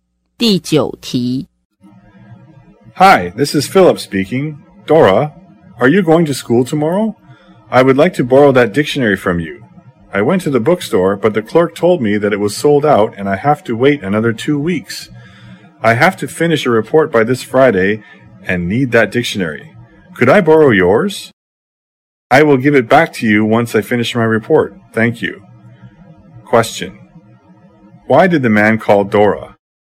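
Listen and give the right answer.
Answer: To borrow her dictionary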